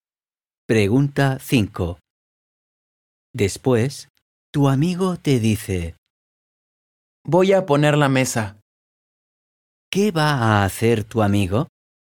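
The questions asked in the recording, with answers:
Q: ¿Qué va a hacer tu amigo?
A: poner la mesa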